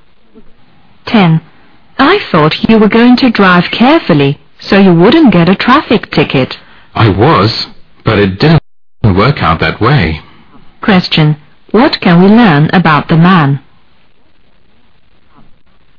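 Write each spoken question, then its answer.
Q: What can we learn about the man?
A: He got a traffic ticket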